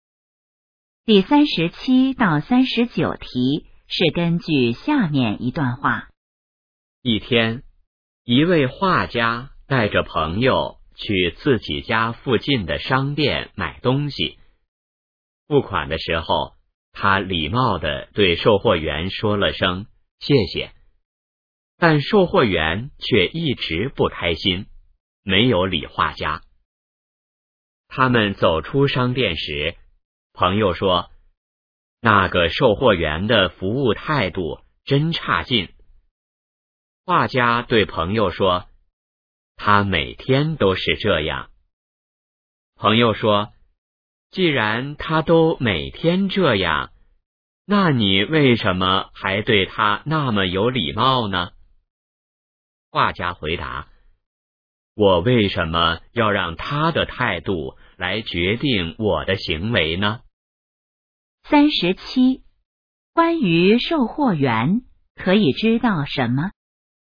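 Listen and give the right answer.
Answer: 售货员服务态度很差,每天都这样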